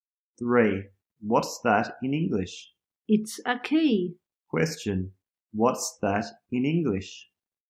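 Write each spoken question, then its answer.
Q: What's that in English?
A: A key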